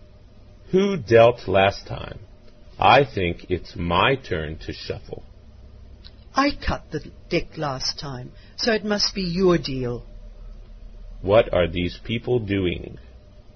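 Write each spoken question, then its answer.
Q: What are these people doing?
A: Playing cards.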